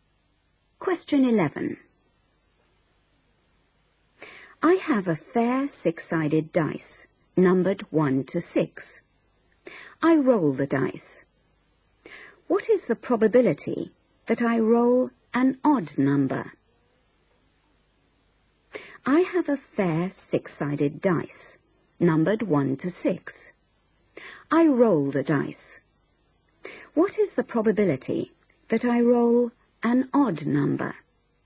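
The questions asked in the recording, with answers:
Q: I roll the dice. What is the probability that I roll an odd number?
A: 1/2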